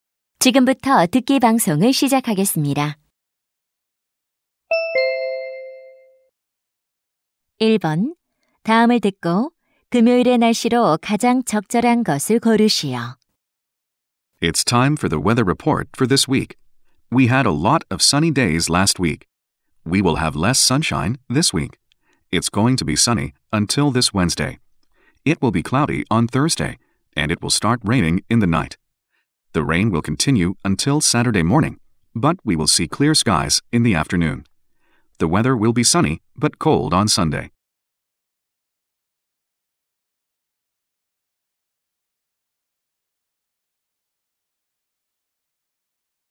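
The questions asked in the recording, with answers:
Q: 다음을 듣고 금요일의 날씨로 가장 적절한 것을 고르시오.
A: 비가 옴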